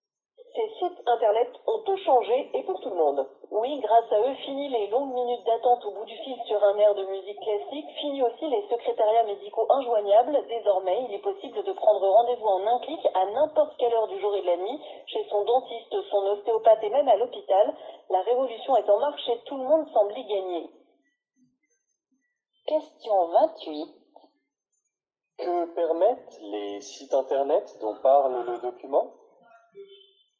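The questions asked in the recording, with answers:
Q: Que permettent les sites internet dont parle le document ?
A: Prendre rendez-vous médical en un clic, à toute heure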